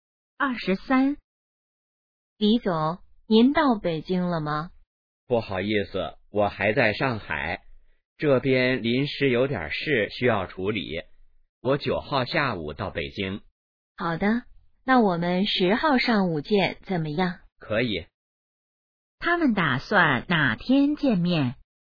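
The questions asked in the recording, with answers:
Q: 他们打算哪天见面?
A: 10号上午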